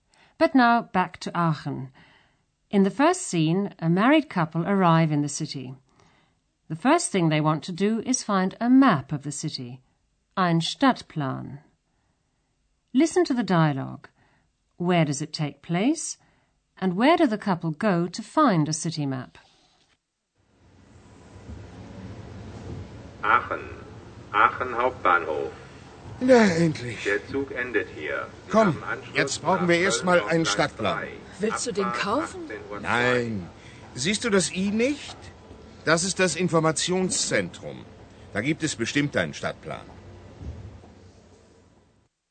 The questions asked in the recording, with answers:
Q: Where does it take place?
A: As you probably guessed from the loudspeaker announcement, the scene is taking place at the main station in Aachen.

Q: And where do the couple go to find a city map?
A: Like most main stations in Germany, it has an information center where you can get a map of the city.